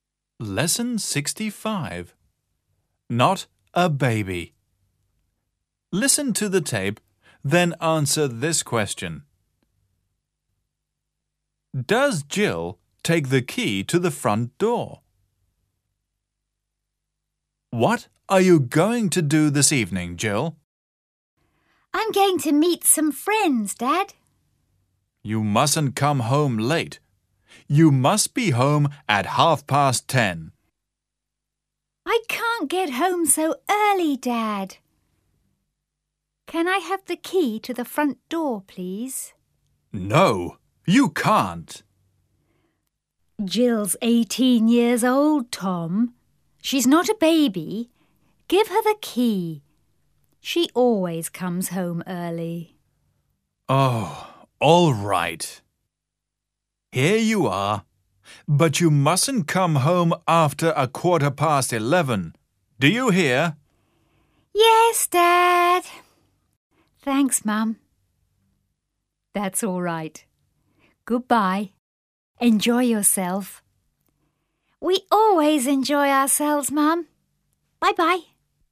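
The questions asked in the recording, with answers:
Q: Does Jill take the key to the front door?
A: Yes, she does.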